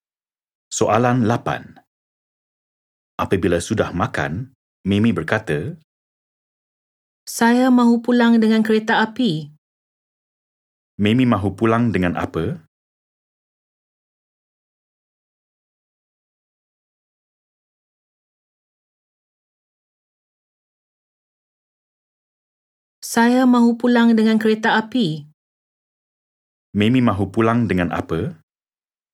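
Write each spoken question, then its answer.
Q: Mimi mahu pulang dengan apa?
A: kereta api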